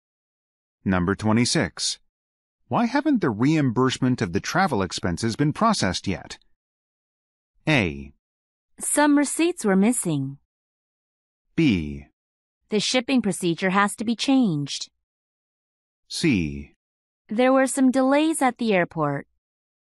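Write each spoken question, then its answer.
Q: Why haven't the reimbursement of the travel expenses been processed yet?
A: A: Some receipts were missing.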